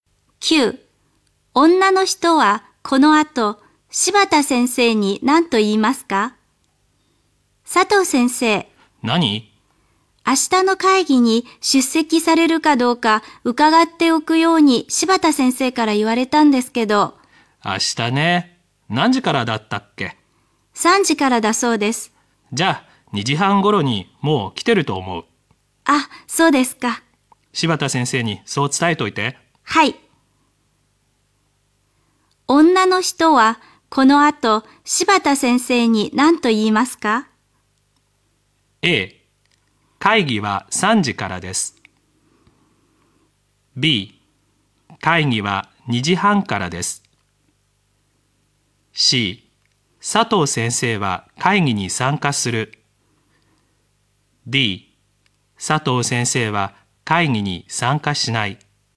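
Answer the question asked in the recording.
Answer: C: 佐藤先生は会議に参加する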